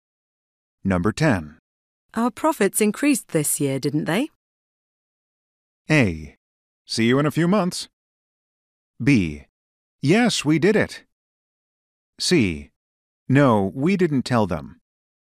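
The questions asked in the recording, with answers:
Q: Our profits increased this year, didn't they?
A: B: Yes, we did it.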